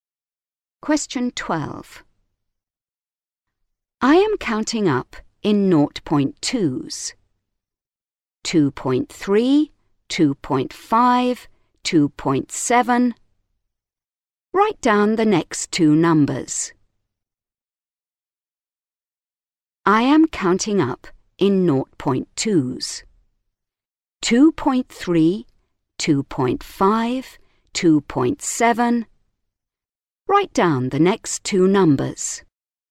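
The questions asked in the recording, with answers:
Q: 2.3, 2.5, 2.7. Write down the next two numbers.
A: 2.9, 3.1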